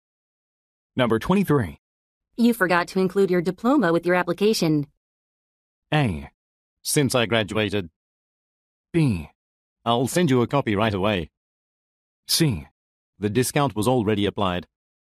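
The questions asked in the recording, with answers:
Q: You forgot to include your diploma with your application.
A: B: I'll send you a copy right away.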